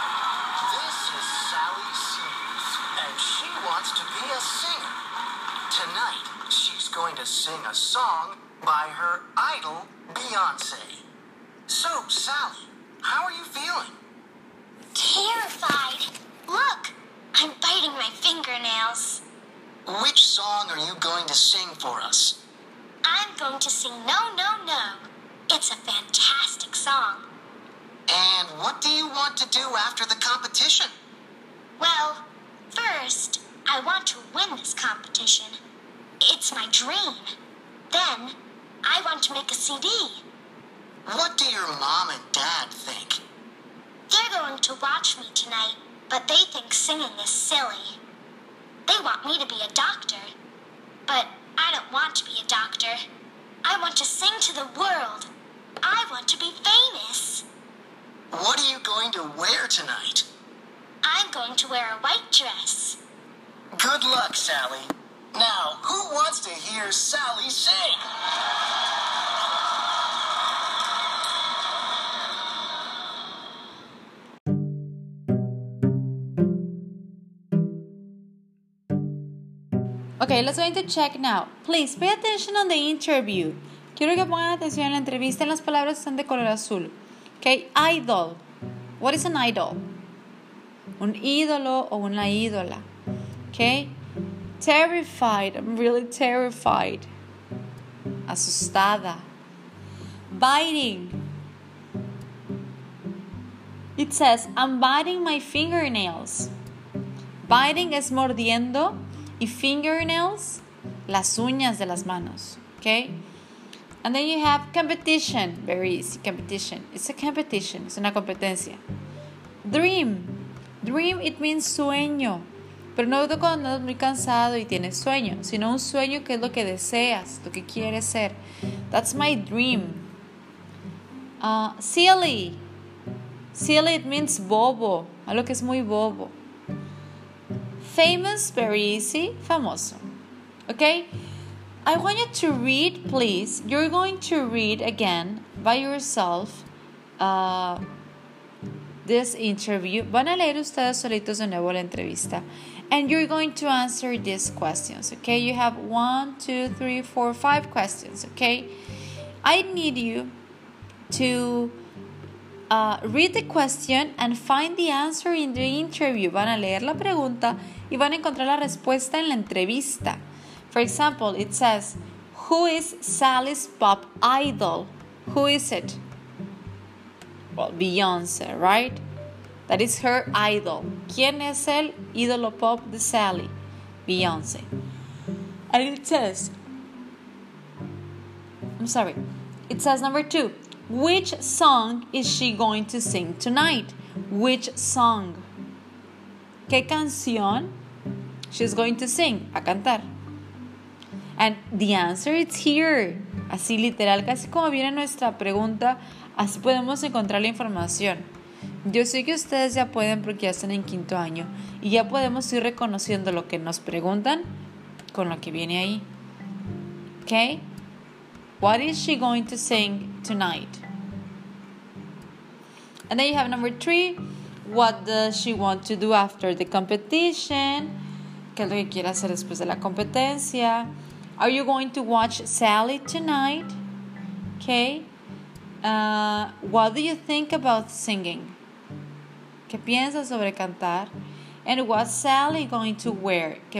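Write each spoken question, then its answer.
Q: What does she want to do after the competition?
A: Win the competition, then make a CD

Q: And what's Sally going to wear?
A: A white dress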